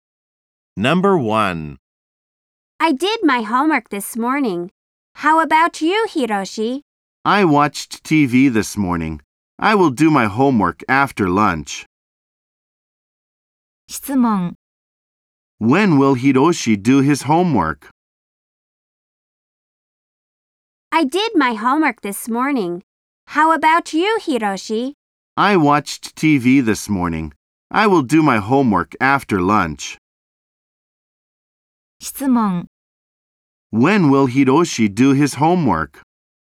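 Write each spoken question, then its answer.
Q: When will Hiroshi do his homework?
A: After lunch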